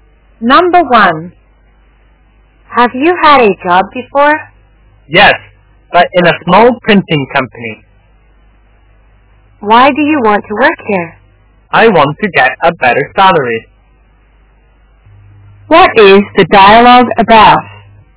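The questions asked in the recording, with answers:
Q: What is the dialogue about?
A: A job interview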